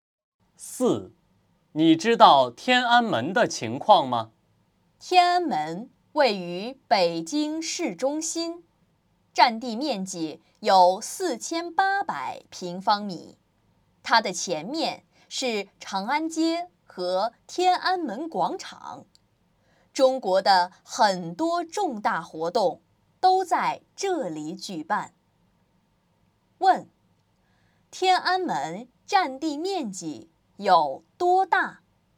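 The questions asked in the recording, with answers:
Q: 天安门占地面积有多大?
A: 4800平方米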